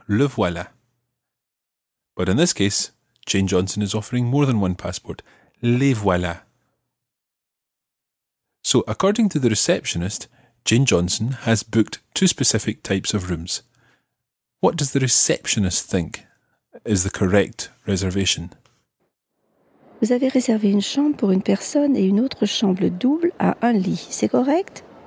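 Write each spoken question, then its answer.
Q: What does the receptionist think is the correct reservation?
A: A single room and a double room with one bed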